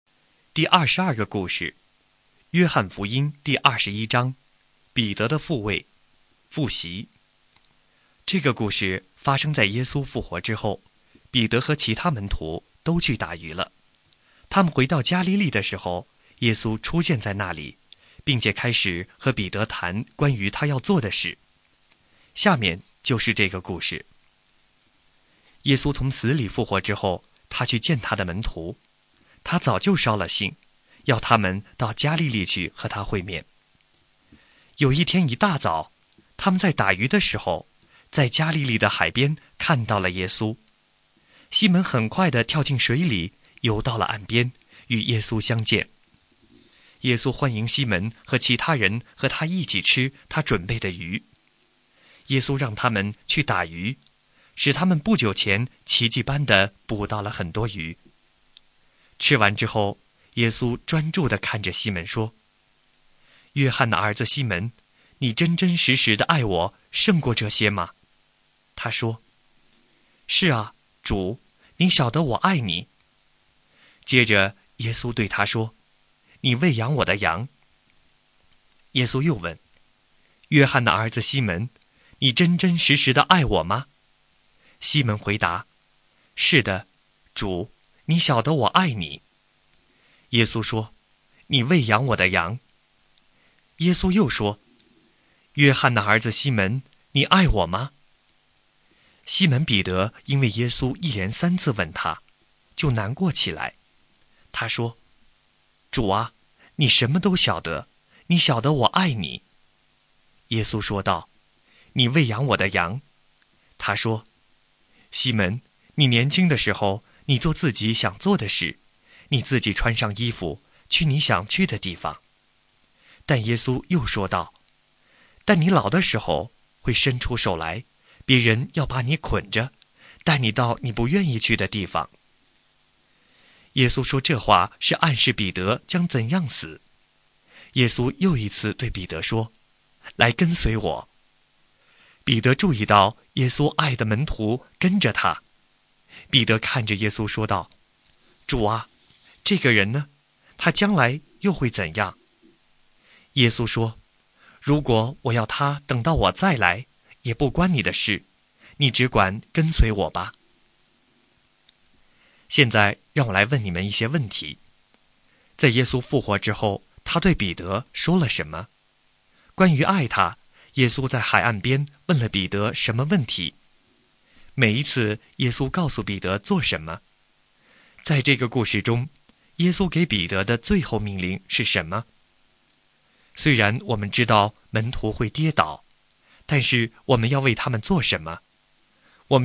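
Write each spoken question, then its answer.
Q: 关于爱他,耶稣在海岸边问了彼得什么问题?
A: 约翰的儿子西门,你爱我(胜过这些)吗?

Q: 每一次耶稣告诉彼得做什么?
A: 喂养我的羊

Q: 在这个故事中,耶稣给彼得的最后命令是什么?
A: 你只管跟随我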